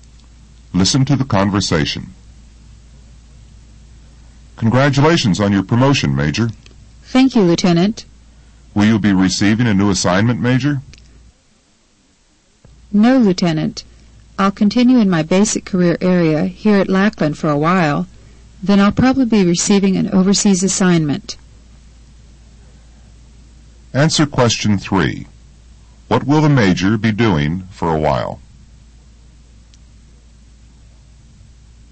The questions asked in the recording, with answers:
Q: What will the Major be doing for a while?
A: The Major will continue in her basic career area at Lackland.